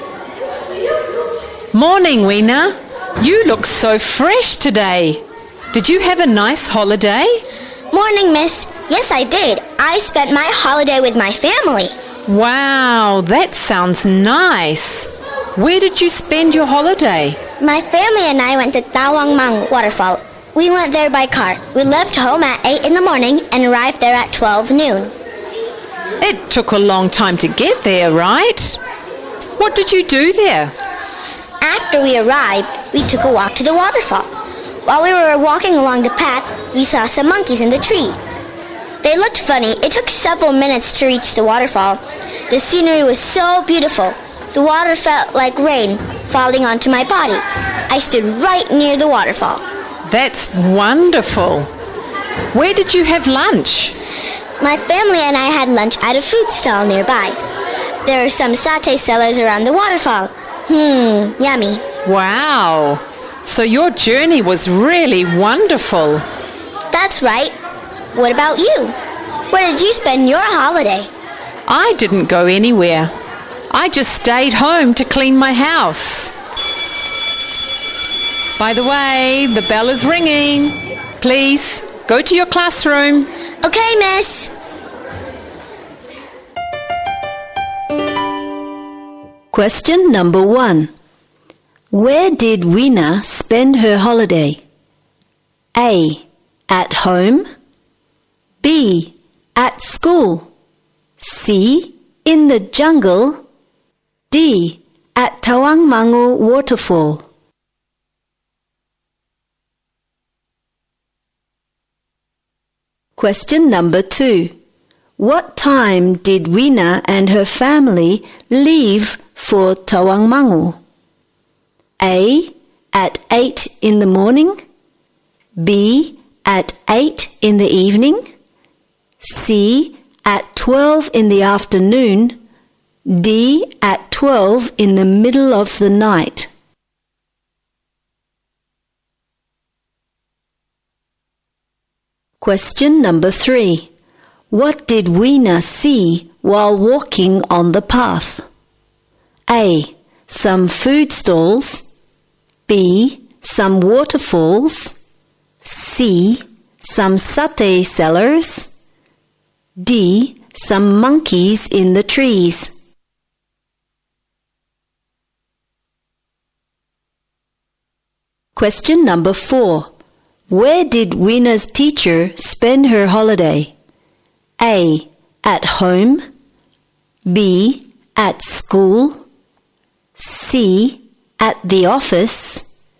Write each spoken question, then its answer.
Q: Where did Weena spend her holiday?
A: D. At Tawangmangu Waterfall.

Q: What time did Weena and her family leave for Tawangmangu?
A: A. At 8 in the morning.

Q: What did Weena see while walking on the path?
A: D. Some monkeys in the trees.

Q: Where did Weena's teacher spend her holiday?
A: A. At home.